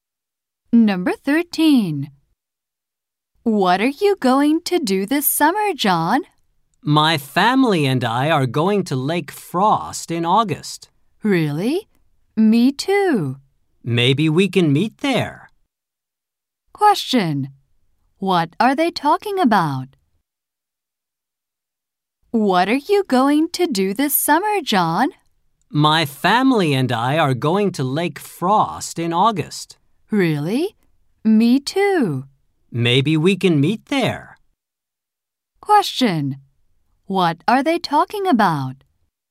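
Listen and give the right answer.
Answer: Their summer plans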